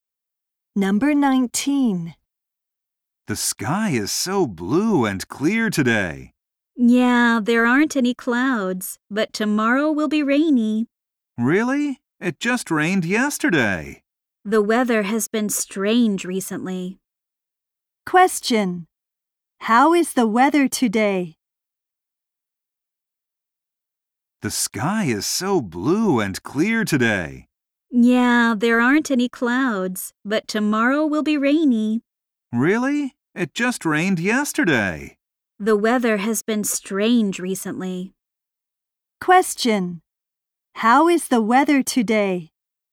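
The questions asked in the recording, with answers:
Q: How is the weather today?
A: Clear and sunny, no clouds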